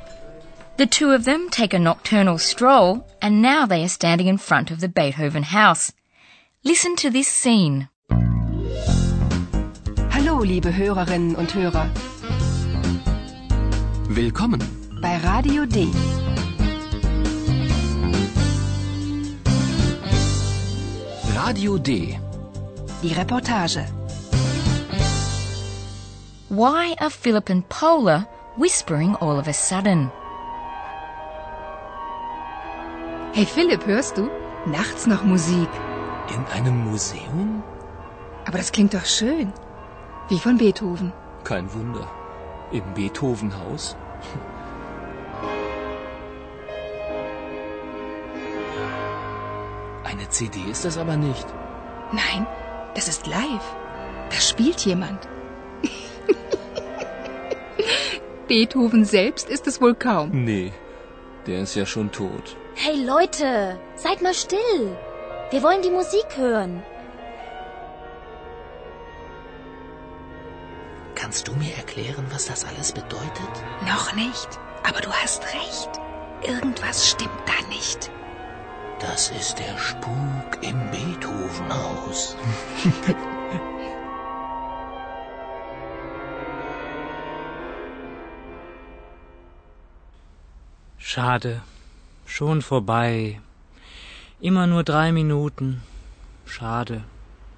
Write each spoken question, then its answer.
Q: Why are Philip and Paula whispering all of a sudden?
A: And after this request, Philip and Paula start whispering.